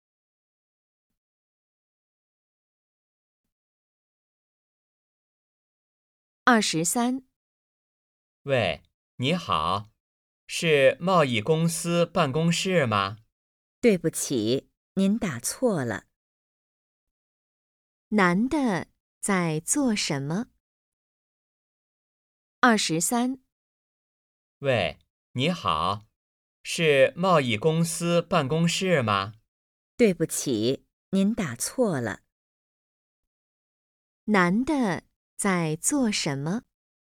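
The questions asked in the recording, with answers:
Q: 男的在做什么?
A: 打电话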